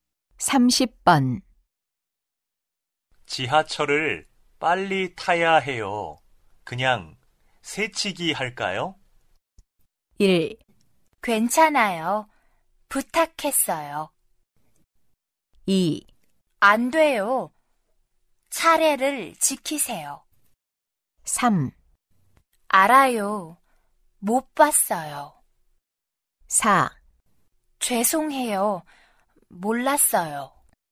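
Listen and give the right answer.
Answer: 2: 안 돼요. 차례를 지키세요.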